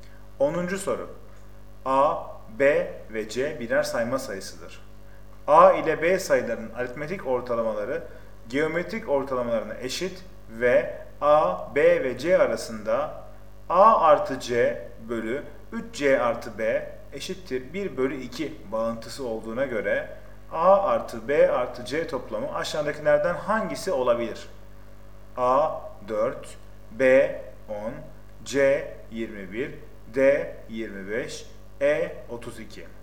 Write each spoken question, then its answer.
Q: A ile B sayılarının aritmetik ortalamaları geometrik ortalamalarına eşit ve A, B ve C arasında A artı C bölü 3C artı B eşittir 1 bölü 2 bağıntısı olduğuna göre A artı B artı C toplamı aşağıdakilerden hangisi olabilir?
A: Doğru cevap C 21.